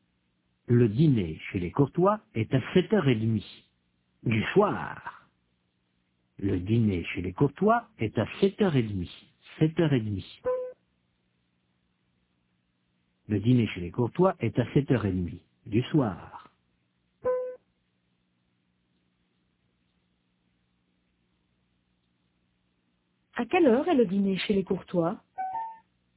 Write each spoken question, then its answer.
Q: À quelle heure est le dîner chez les Courtois ?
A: À 7h30 du soir.